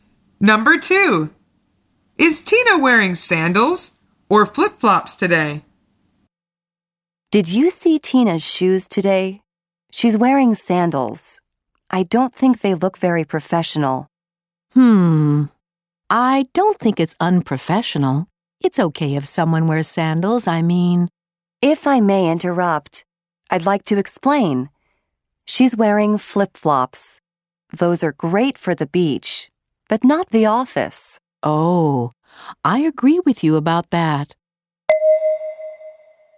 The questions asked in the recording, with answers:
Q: Is Tina wearing sandals or flip-flops today?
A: The answer is flip-flops.